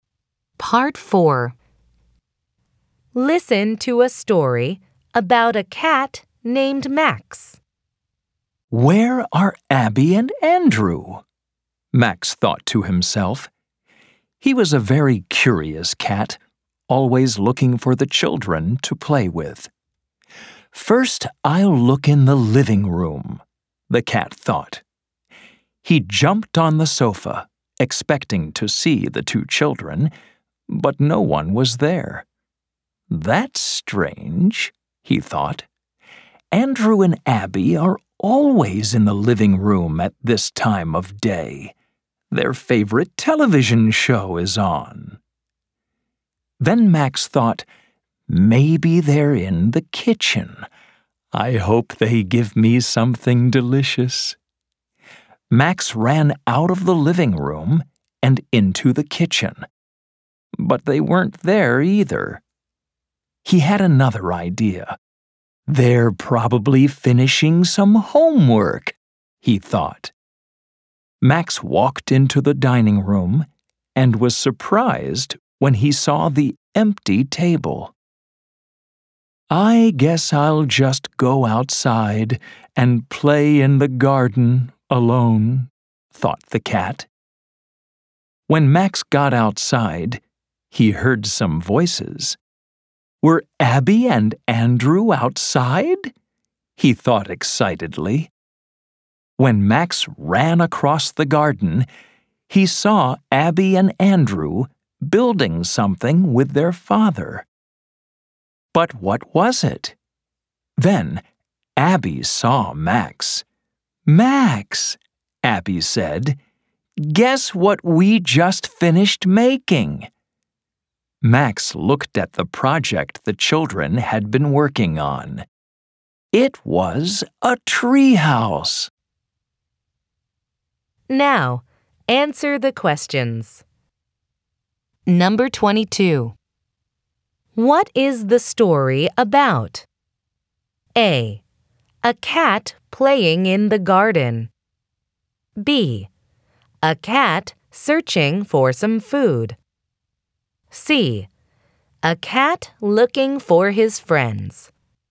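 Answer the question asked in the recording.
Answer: C: A cat looking for his friends.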